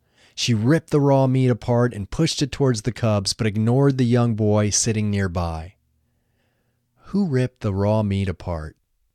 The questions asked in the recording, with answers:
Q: Who ripped the raw meat apart?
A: The mother wolf ripped the raw meat apart.